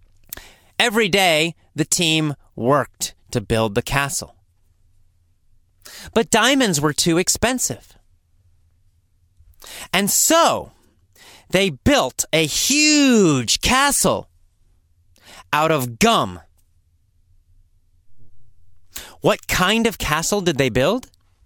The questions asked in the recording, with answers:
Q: What kind of castle did they build?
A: They built a gum castle.